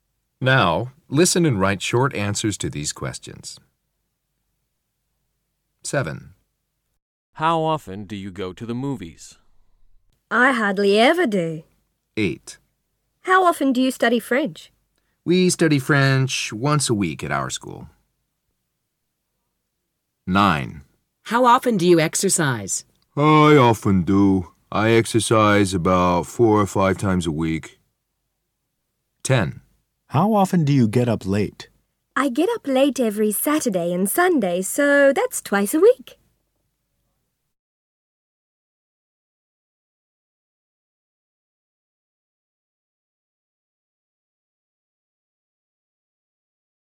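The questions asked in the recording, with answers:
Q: How often do you go to the movies?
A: Hardly ever

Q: How often do you study French?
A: Once a week

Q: How often do you exercise?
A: Often, about 4 or 5 times a week

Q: How often do you get up late?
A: Twice a week (every Saturday and Sunday)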